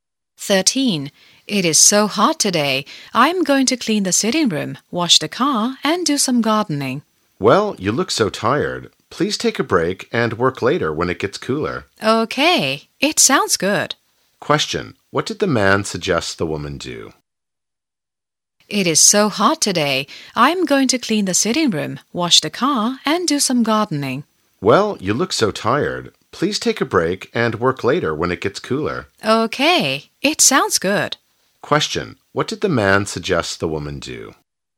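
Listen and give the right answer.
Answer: Take a break and work later when it gets cooler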